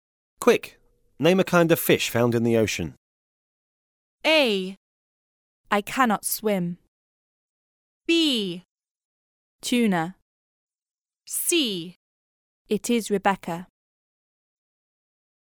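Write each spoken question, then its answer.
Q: Quick, name a kind of fish found in the ocean.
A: B: Tuna.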